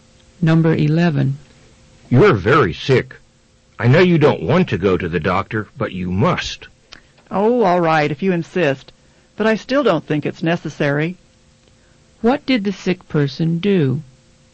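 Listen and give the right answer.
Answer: Agreed to go to the doctor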